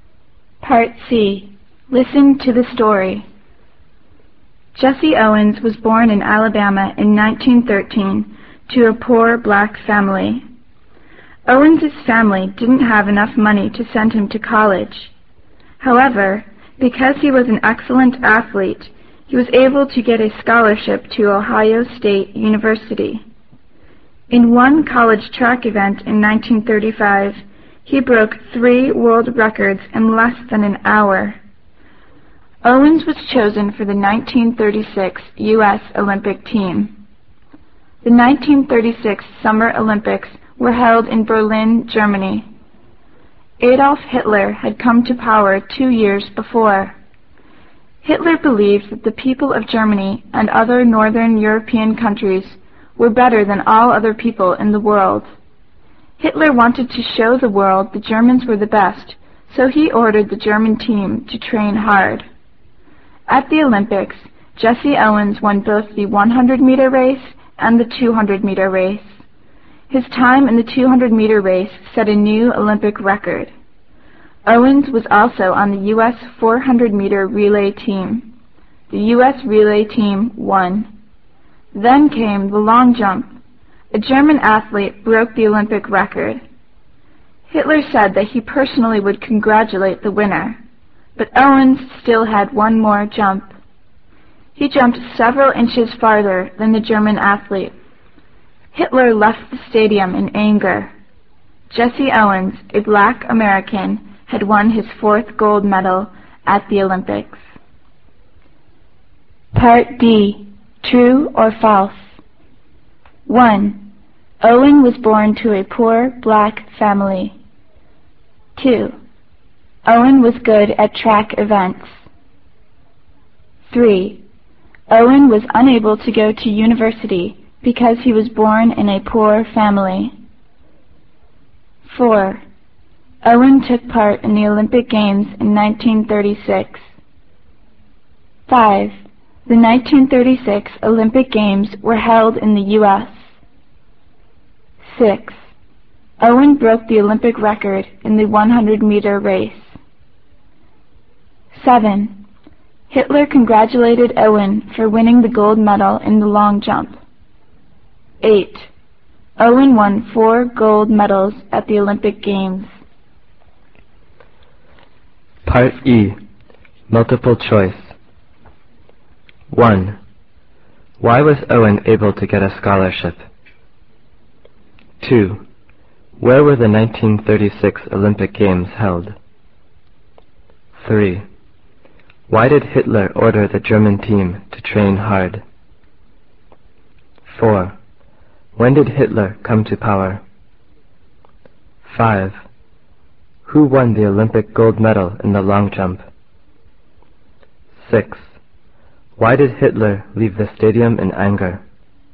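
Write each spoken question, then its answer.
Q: Owen was born to a poor black family.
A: True

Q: Owen was good at track events.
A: True

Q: Owen was unable to go to university because he was born in a poor family.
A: False

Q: Owen took part in the Olympic Games in 1936.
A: True

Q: The 1936 Olympic Games were held in the U.S.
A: False

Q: Hitler congratulated Owen for winning the gold medal in the long jump.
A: False

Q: Owen won 4 gold medals at the Olympic Games.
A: True

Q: Why was Owen able to get a scholarship?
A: Because he was an excellent athlete

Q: Where were the 1936 Olympic Games held?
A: Berlin, Germany

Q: Why did Hitler order the German team to train hard?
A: To show the world the Germans were the best

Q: When did Hitler come to power?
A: In 1934

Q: Who won the Olympic gold medal in the long jump?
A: Jesse Owens

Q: Why did Hitler leave the stadium in anger?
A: Owens jumped farther than the German athlete and won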